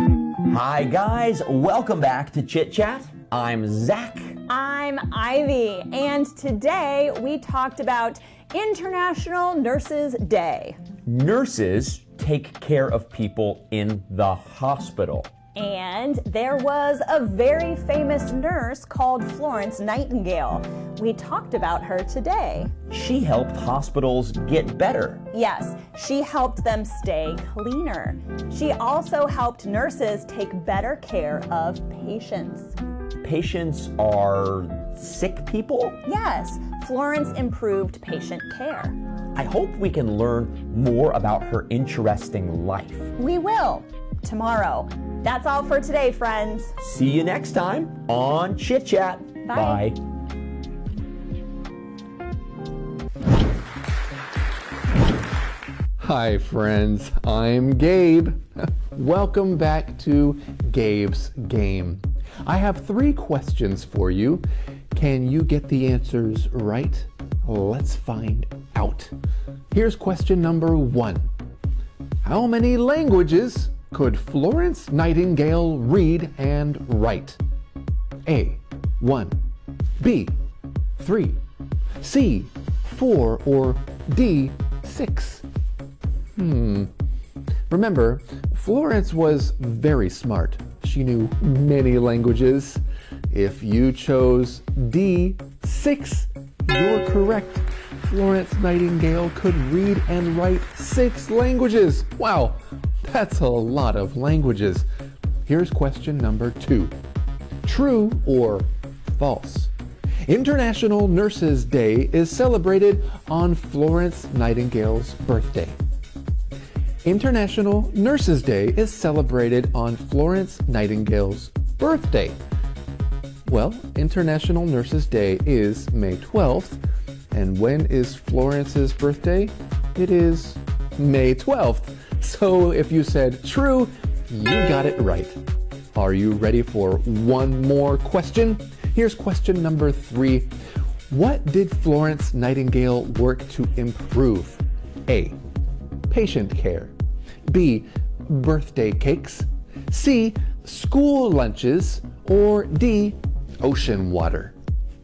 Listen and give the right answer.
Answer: So the correct answer is A, patient care.